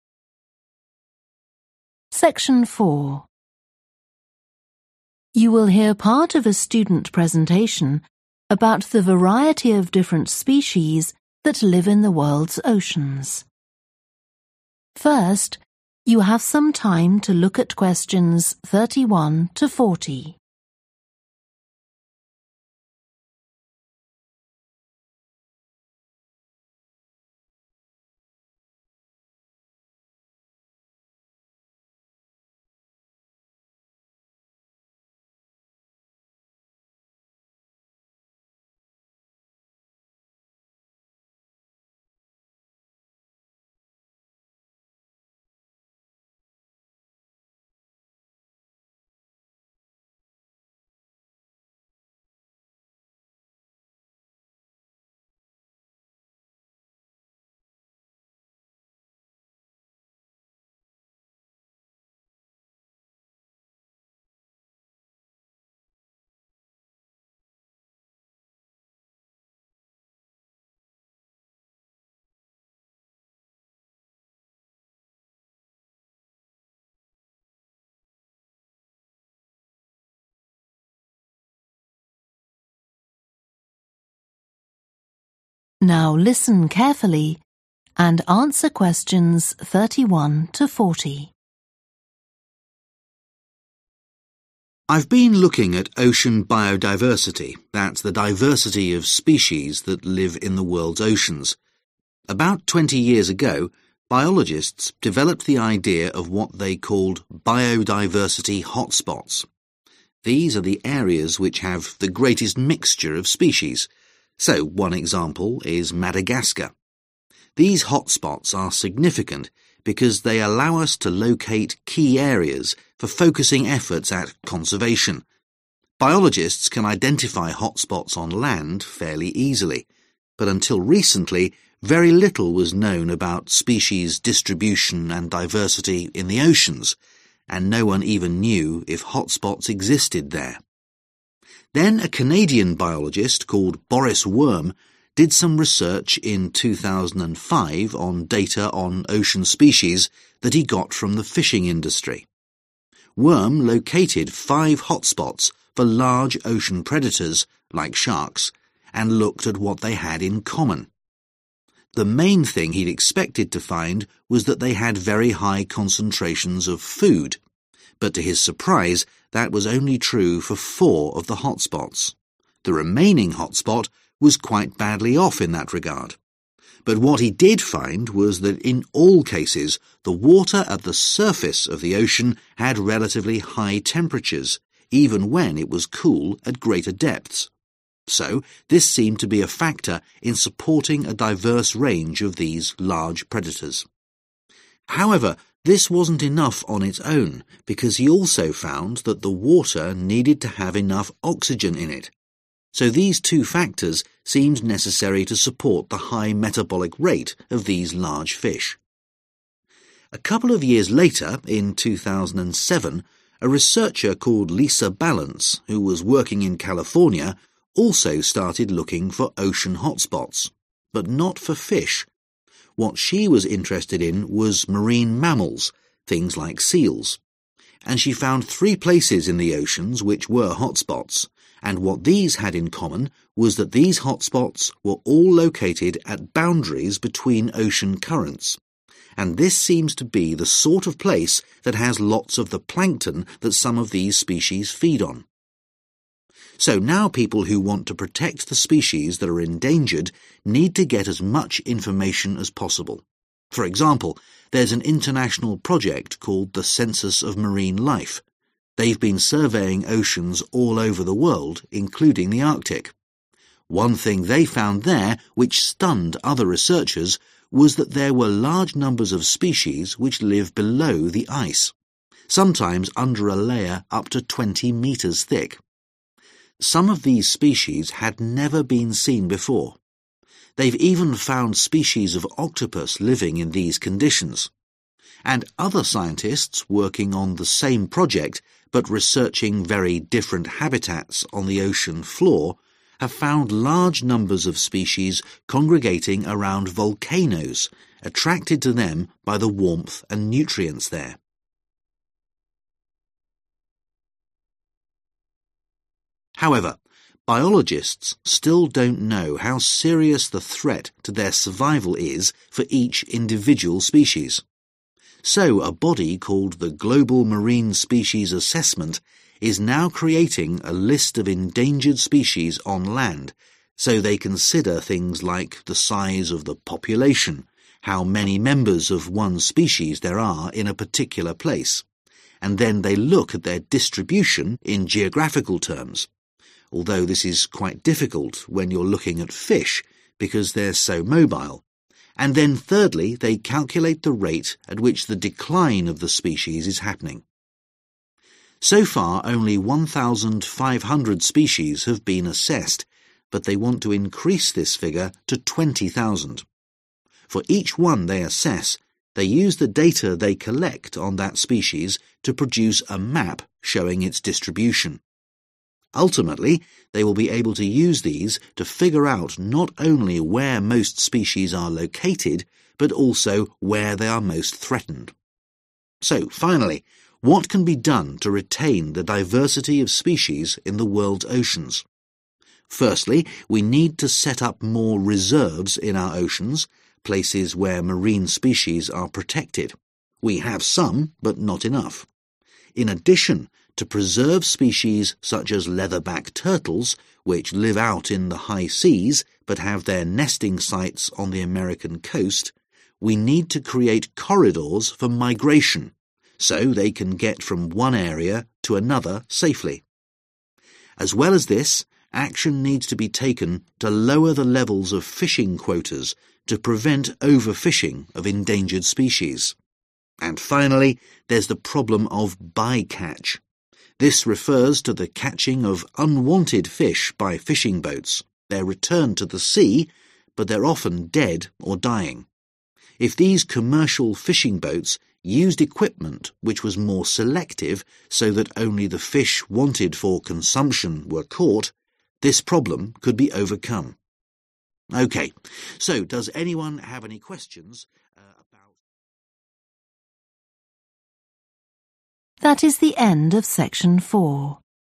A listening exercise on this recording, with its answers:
Complete the notes below. Write ONE WORD ONLY for each answer.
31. important for locating targets for 31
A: conservation

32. were not always rich in 32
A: food

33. had higher temperatures at the 33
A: surface

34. had sufficient 34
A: oxygen

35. looked for hotspots for marine 35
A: mammals

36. under the 36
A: ice

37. rate of 37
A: decline

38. Aim: to assess 20,000 species and make a distribution 38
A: map

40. catch fish only for the purpose of 40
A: consumption

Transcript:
I've been looking at ocean biodiversity, that's the diversity of species that live in the world's oceans. About 20 years ago biologists developed the idea of what they called 'biodiversity hotspots'. These are the areas which have the greatest mixture of species, so one example is Madagascar. Biologists can identify hotspots on land, fairly easily, but until recently, very little was known about species distribution and diversity in the oceans, and no one even knew if hotspots existed there.
Then a Canadian biologist called Boris Worm did some research in 2005 on data on ocean species that he got from the fishing industry. Worm located five hotspots for large ocean predators like sharks, and looked at what they had in common. (Q32) The main thing he'd expected to find was that they had very high concentrations (= rich in) of food(s), but to his surprise that was only true for four of the hotspots – the remaining hotspots was quite badly off in that regard. However, this wasn't enough on its own, (Q34) because he also found that the water needed to have enough (= sufficient) oxygen/O2 in it (bởi vì ông ấy nhận ra rằng nước cũng cần có đủ oxy) – so these two factors seemed necessary to support the high metabolic rate of these large fish.
A couple of years later, in 2007, a researcher called Lisa Balance, who was working in California, also (Q35) started looking for ocean hotspots, but not for fish – what she was interested in was marine mammals, things like seals. (bắt đầu tìm kiếm những điểm nóng đại dương chứ không phải cá – thứ mà cô ấy quan tâm là những động vật có vú ở biển, ví dụ như hải cẩu) And she found three places in the oceans which were hotspots, and what these had in common was that these hotspots were all located at boundaries between ocean currents, and this seems to be the sort of place that has lots of the plankton that some of these species feed on.
So now people who want to protect the species that are endangered need to get as much information as possible. For example, there's an international project called the Census of Marine Life. They've been surveying oceans all over the world, including the Arctic. Some of these species had never been seen before. They've even found species of octopus living in these conditions. And other scientists working on the same project, but researching very different habitats on the ocean floor, have found large numbers of species congregating around volcanoes, attracted to them by the warmth and nutrients there.
However, biologists still don't know how serious the threat to their survival is for each individual species. So a body called the Global Marine Species Assessment is now creating a list of endangered species on land, so they consider things like the size of the population – how many members of one species there are in a particular place – and then they look at their distribution in geographical terms, although this is quite difficult when you're looking at fish, because they're so mobile, and then (Q37) thirdly they calculate the rate at which the decline/ declining/ decrease of the species is happening.
So far only 1,500 species have been assessed, but they want to increase this figure to 20,000. (Q38) For each one they assess, they use the data they collect on that species to produce a map showing its distribution.
So finally, what can be done to retain the diversity of species in the world's oceans? Firstly, we need to set up more reserves in our oceans, places where marine species are protected. We have some, but not enough. (Q39) In addition, to preserve species such as leatherback turtles, which live out in the high seas but have their nesting sites on the American coast, we need to create corridors for migration, so they can get from one area to another safely. And finally, there's the problem of 'by-catch'. This refers to the catching of unwanted fish by fishing boats – they're returned to the sea, but they're often dead or dying. (Q40) If these commercial fishing boats used equipment which was more selective, so that only the fish wanted for (= fish only for the purpose of) consumption were caught, this problem could be overcome.